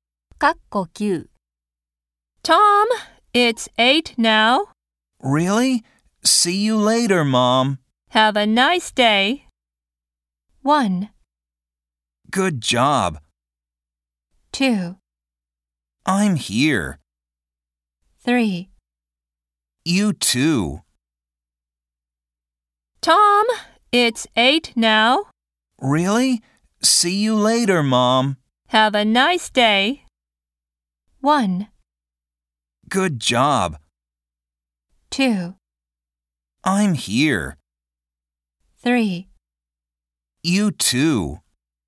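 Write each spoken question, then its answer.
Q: Have a nice day.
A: 3: You too.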